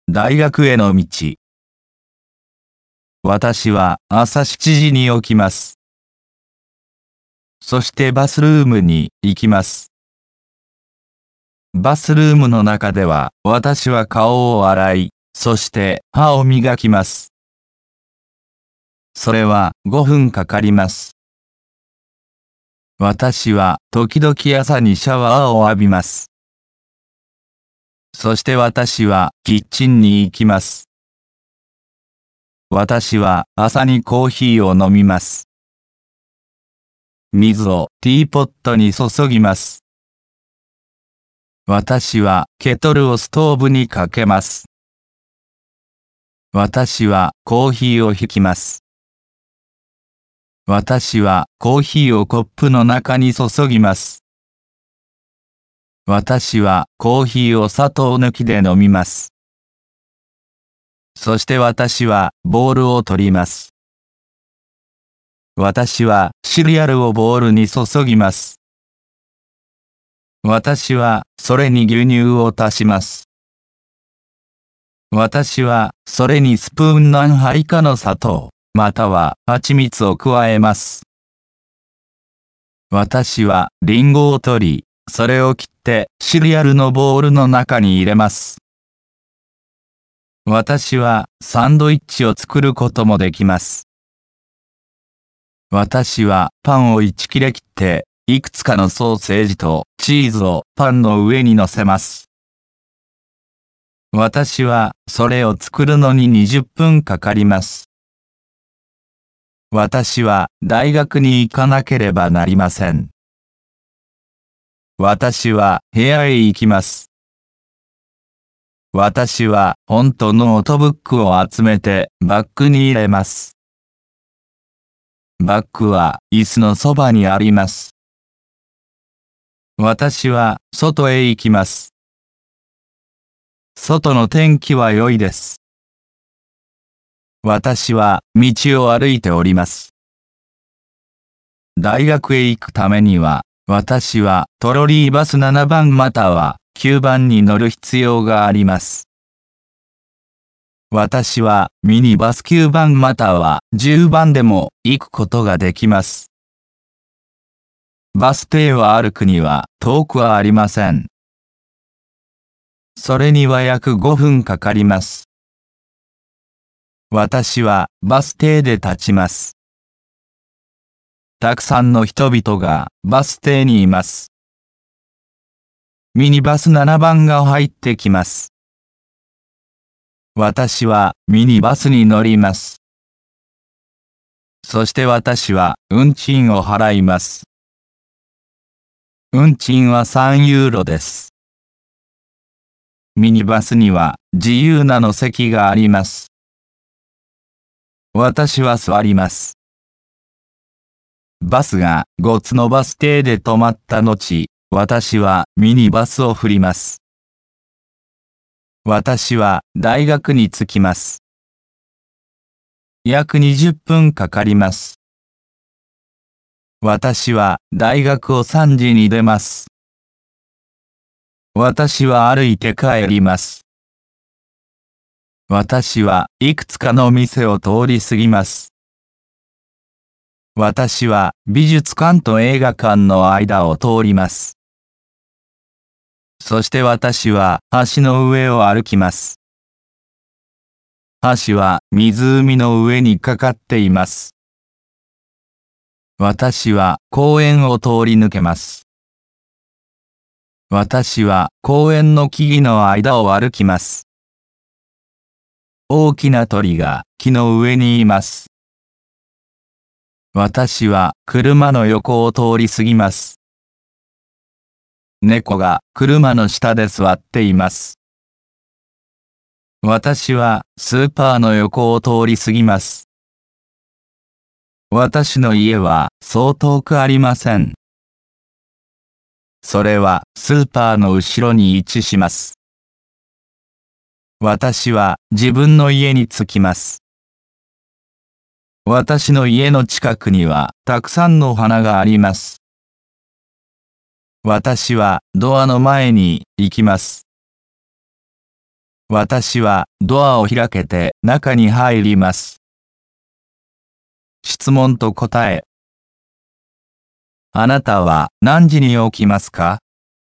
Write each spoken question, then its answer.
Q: あなたは何時に起きますか?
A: 私は朝7時に起きます。